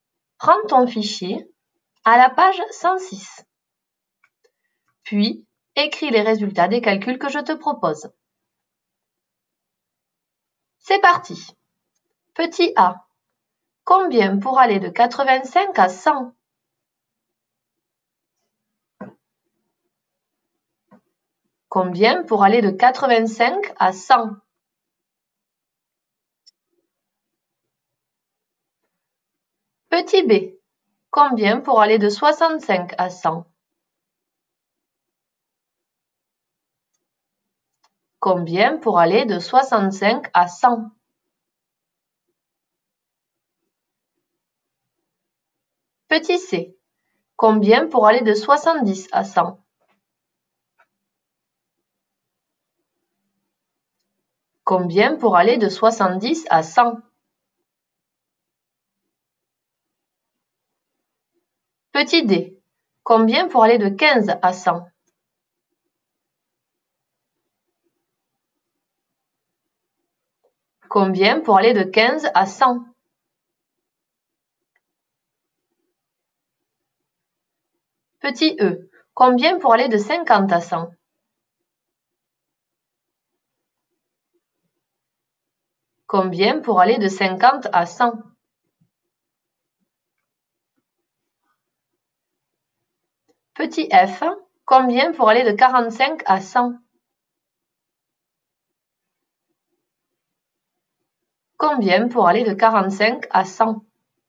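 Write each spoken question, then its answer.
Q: Combien pour aller de 85 à 100?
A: 15

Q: Combien pour aller de 65 à 100?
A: 35

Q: Combien pour aller de 70 à 100?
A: 30

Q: Combien pour aller de 15 à 100?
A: 85

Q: Combien pour aller de 50 à 100?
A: 50

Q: Combien pour aller de 45 à 100?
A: 55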